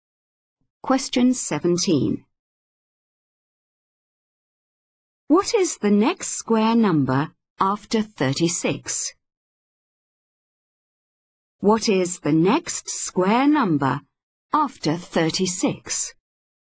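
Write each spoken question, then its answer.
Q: What is the next square number after 36?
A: 49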